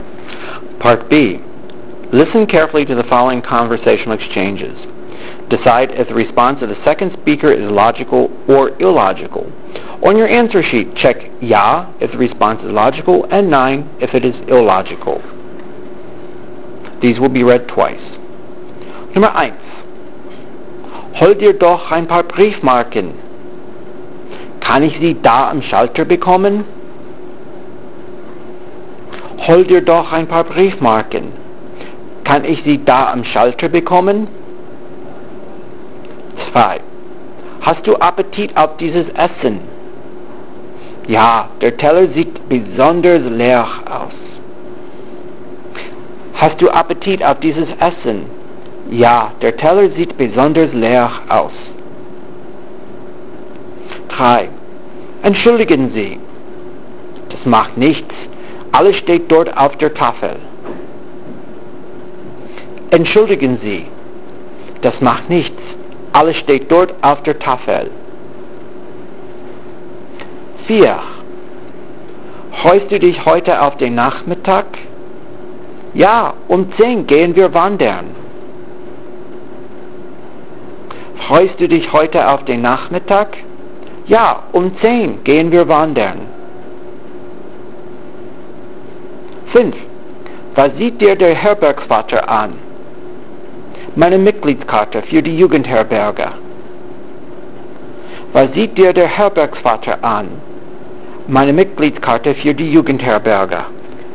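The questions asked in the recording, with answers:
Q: Hol dir doch ein paar Briefmarken. Kann ich sie da am Schalter bekommen?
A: ja (logical)

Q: Hast du Appetit auf dieses Essen? Ja, der Teller sieht besonders leer aus.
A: nein (illogical)

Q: Freust du dich heute auf den Nachmittag? Ja, um 10 gehen wir wandern.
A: nein (illogical)

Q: Was sieht dir der Herbergsvater an? Meine Mitgliedskarte für die Jugendherberge.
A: ja (logical)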